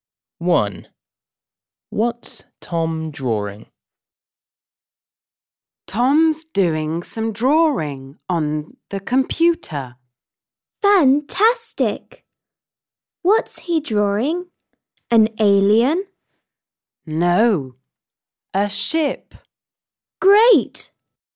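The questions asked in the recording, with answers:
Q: What's Tom drawing?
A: a ship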